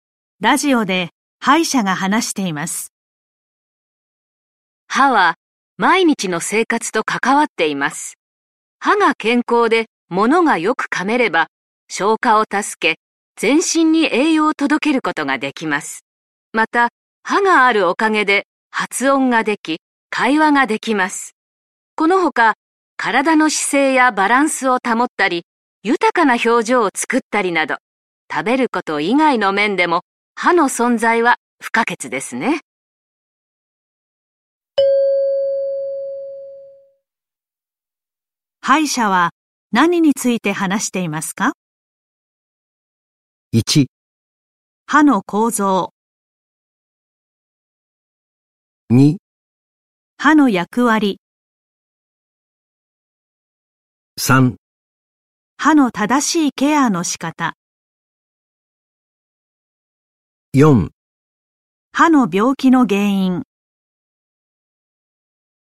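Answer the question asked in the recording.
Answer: 2: 歯の役割。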